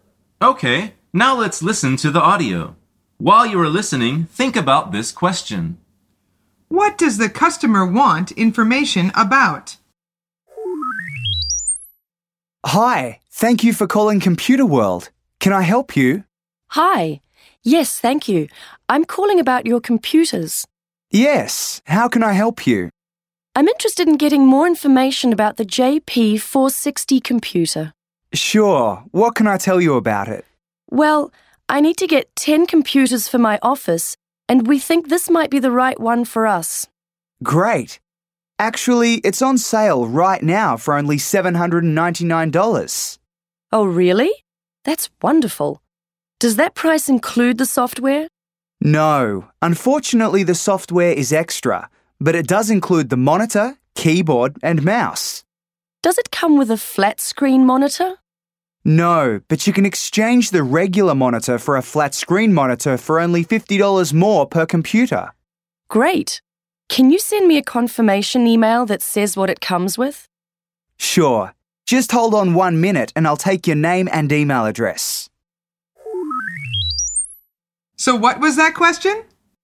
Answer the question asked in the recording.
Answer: The answer is a computer.